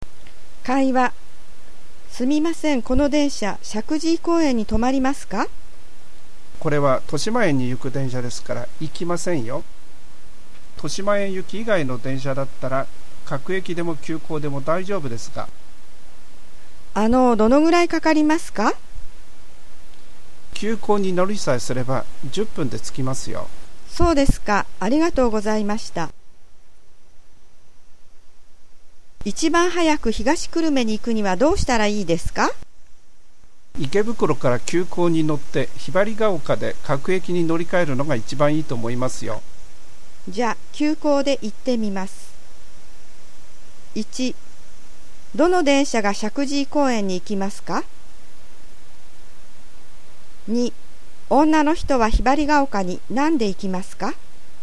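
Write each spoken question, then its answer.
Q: どの電車が石神井公園に行きますか?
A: 豊島園行き以外の電車(各駅でも急行でも)

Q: 女の人はひばりが丘に何で行きますか?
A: 急行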